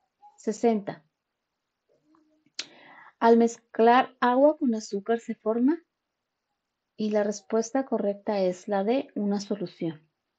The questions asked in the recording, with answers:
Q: Al mezclar agua con azúcar se forma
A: una solución